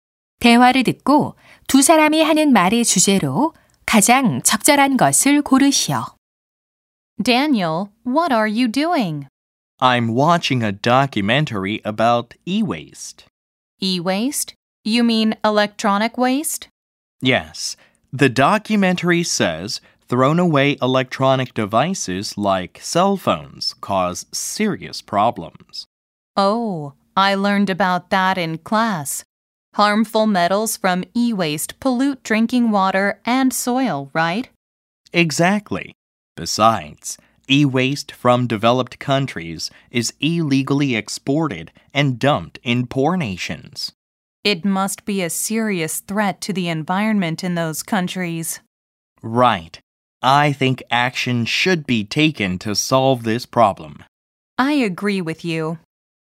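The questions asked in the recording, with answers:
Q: 대화를 듣고 두 사람이 하는 말의 주제로 가장 적절한 것을 고르시오.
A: 전자 폐기물이 일으키는 심각한 문제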